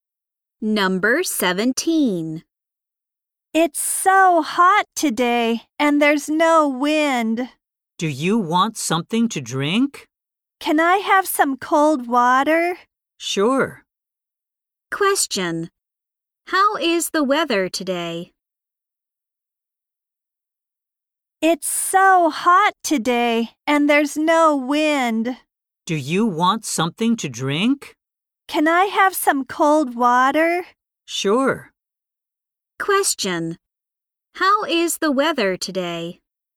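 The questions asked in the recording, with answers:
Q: How is the weather today?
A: Hot with no wind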